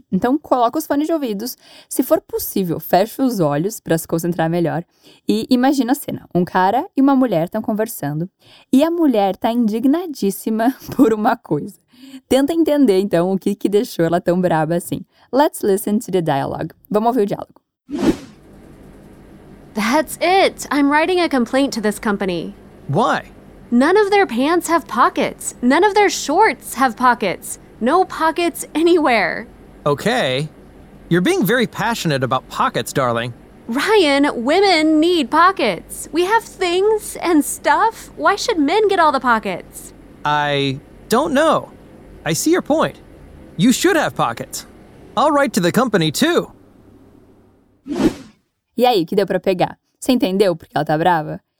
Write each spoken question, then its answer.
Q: Você entendeu porque ela tá brava?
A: E ali pelas tantas ela diz: No pockets anywhere.